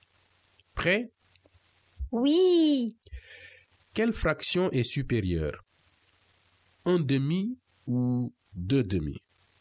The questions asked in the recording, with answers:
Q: Quelle fraction est supérieure? Un demi ou deux demi?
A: Deux demi est supérieur à un demi, car le numérateur 2 est supérieur au numérateur 1.